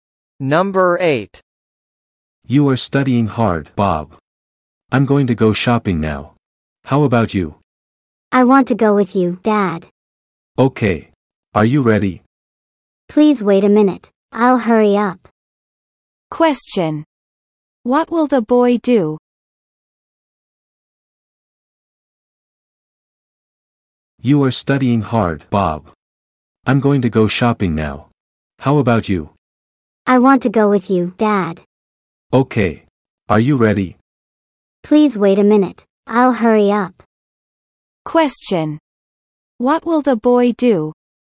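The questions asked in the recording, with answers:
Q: What will the boy do?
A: He will go shopping with his dad.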